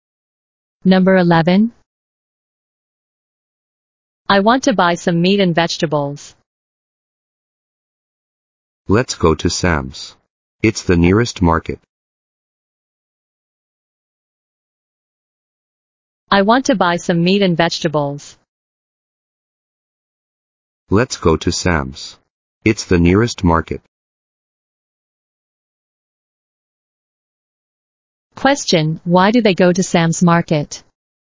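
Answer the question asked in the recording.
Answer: Because it's the nearest market.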